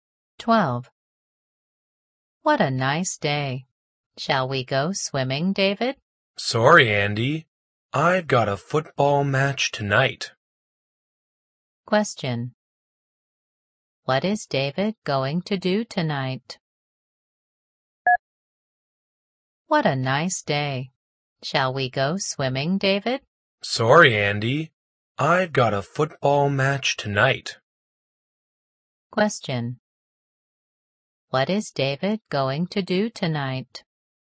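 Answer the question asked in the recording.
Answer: Play in a football match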